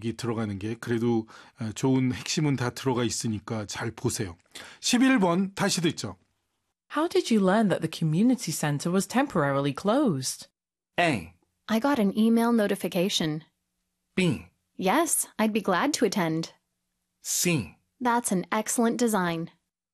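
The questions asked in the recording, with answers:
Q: How did you learn that the community center was temporarily closed?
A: A: I got an email notification.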